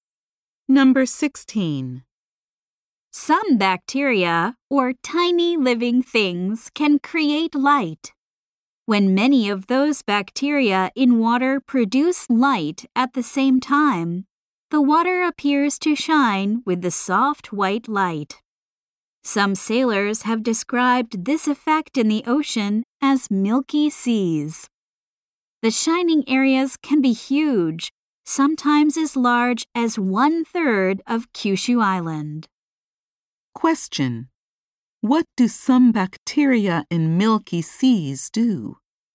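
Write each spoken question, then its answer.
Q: What do some bacteria in milky seas do?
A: They produce light, making the water shine.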